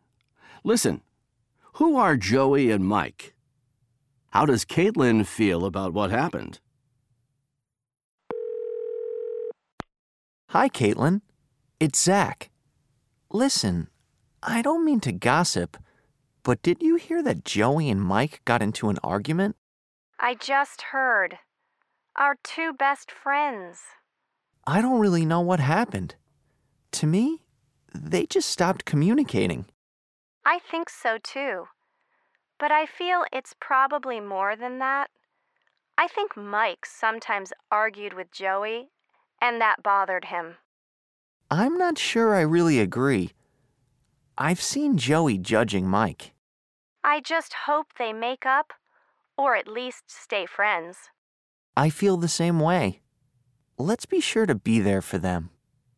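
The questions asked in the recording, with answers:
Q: Who are Joey and Mike?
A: Zach and Caitlin's two best friends

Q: How does Caitlin feel about what happened?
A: She hopes they make up, or at least stay friends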